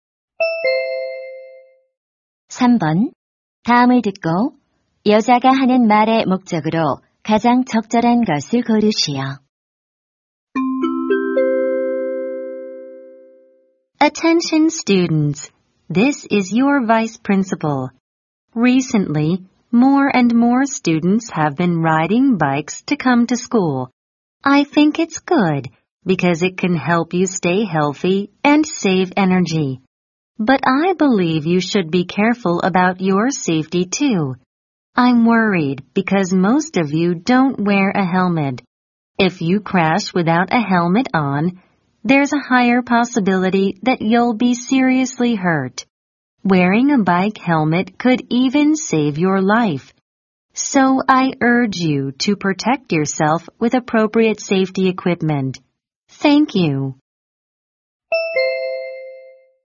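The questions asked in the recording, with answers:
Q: 다음을 듣고 여자가 하는 말의 목적으로 가장 적절한 것을 고르시오.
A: 자전거 탈 때 헬멧 착용을 권장하려고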